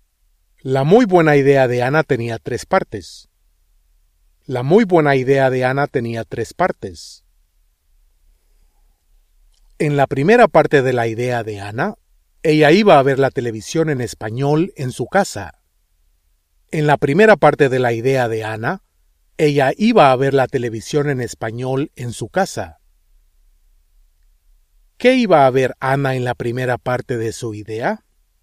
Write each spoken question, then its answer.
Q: ¿Qué iba a ver Anna en la primera parte de su idea?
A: La televisión.